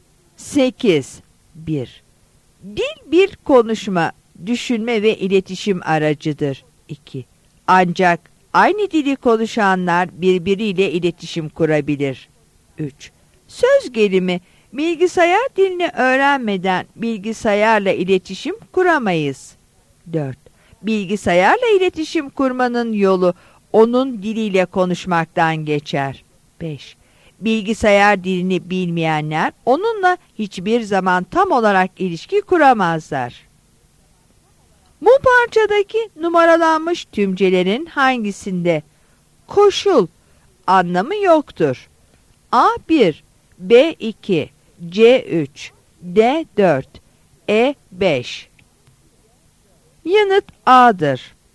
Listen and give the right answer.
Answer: Yanıt A'dır.